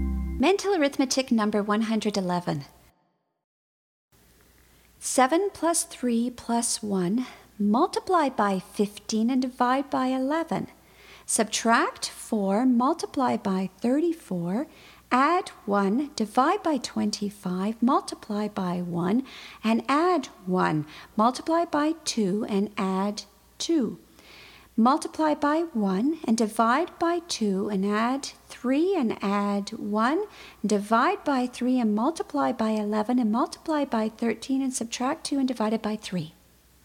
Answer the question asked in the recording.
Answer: And the answer is 333.